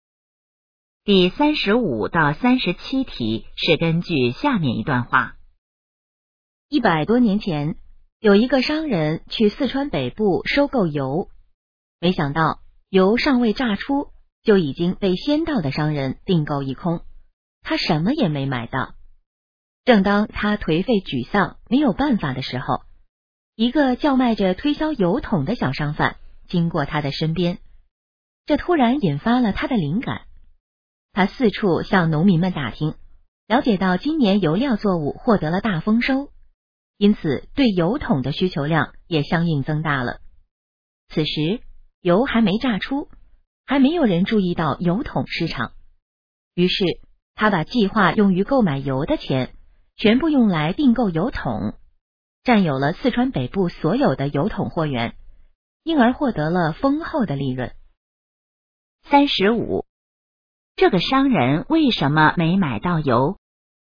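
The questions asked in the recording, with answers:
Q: 这个商人为什么没买到油?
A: 油还没榨出就已经被先到的商人订购一空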